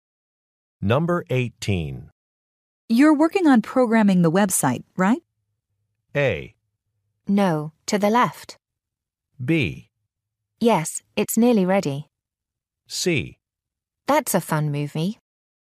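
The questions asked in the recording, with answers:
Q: You're working on programming the website, right?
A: B: Yes, it's nearly ready.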